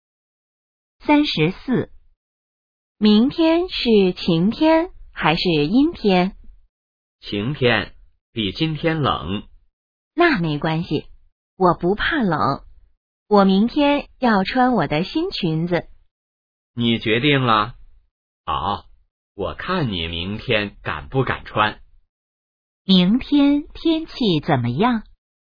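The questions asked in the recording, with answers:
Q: 明天天气怎么样?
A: 晴天,比今天冷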